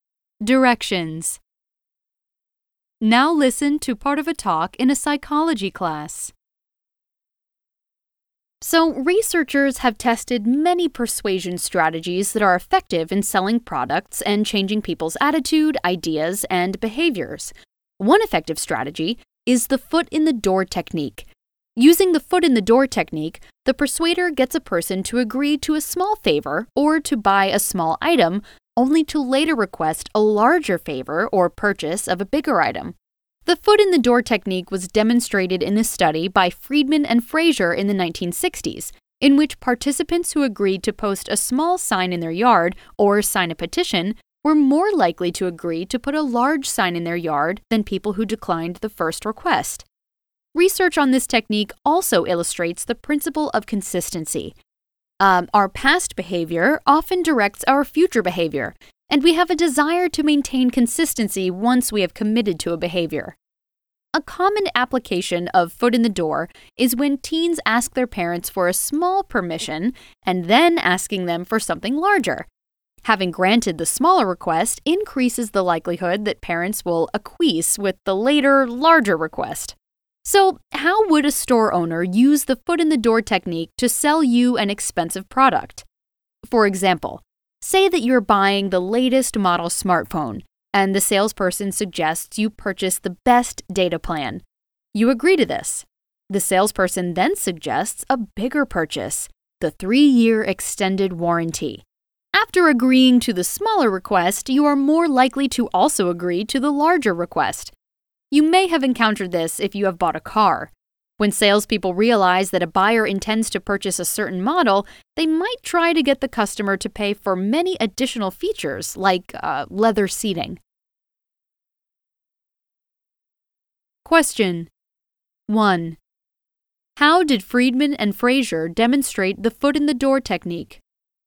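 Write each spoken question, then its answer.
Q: How did Friedman and Fraser demonstrate the foot-in-the-door technique?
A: In a study where people who agreed to a small request (posting a small sign or signing a petition) were more likely to later agree to put a large sign in their yard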